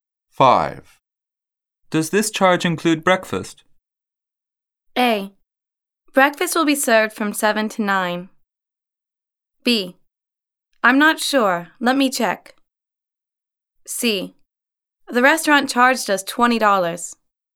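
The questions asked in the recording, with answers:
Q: Does this charge include breakfast?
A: B: I'm not sure. Let me check.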